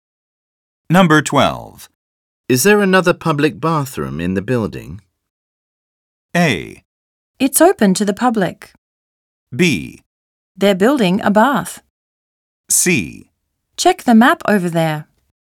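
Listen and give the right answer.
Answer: C: Check the map over there.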